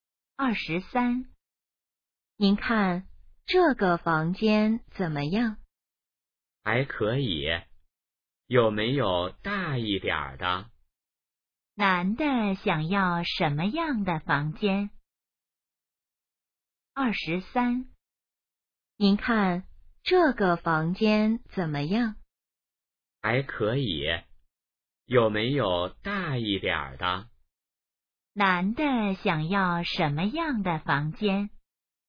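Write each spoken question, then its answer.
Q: 男的想要什么样的房间?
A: 大一点的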